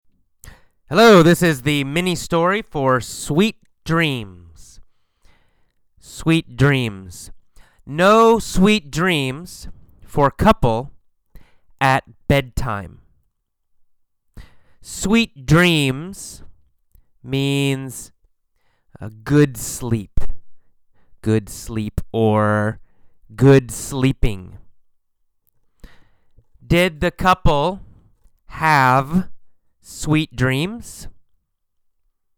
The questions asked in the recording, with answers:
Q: Did the couple have sweet dreams?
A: No, they didn't have sweet dreams.